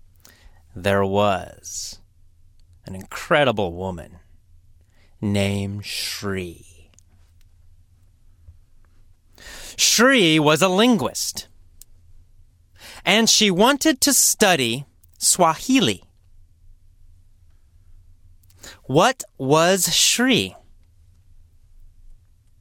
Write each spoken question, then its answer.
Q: What was Shri?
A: Well, she was a linguist.